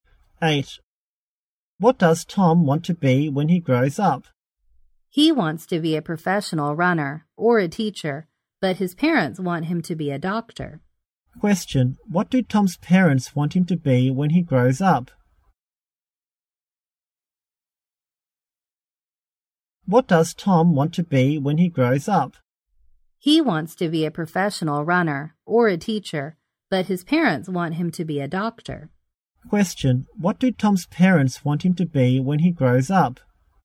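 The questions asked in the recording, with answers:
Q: Question, what do Tom's parents want him to be when he grows up?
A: A doctor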